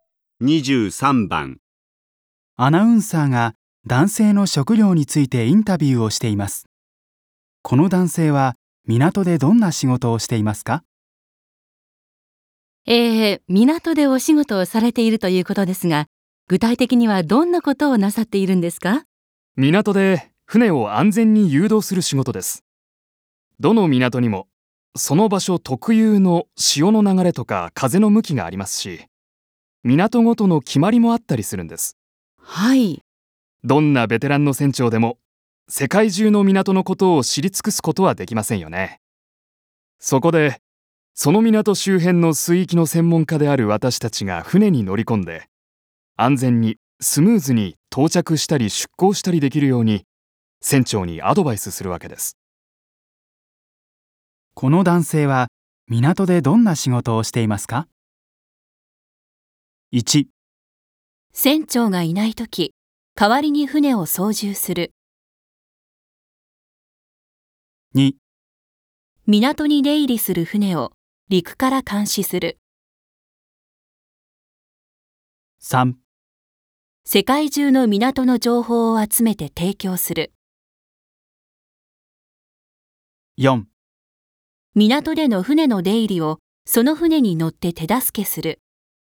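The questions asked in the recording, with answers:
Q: この男性は港でどんな仕事をしていますか?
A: 4: 港での船の出入りをその船に乗って手助けする。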